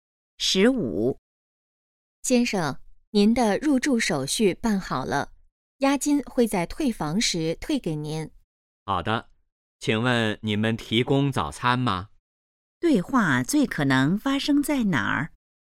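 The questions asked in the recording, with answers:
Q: 对话最可能发生在哪儿?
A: 酒店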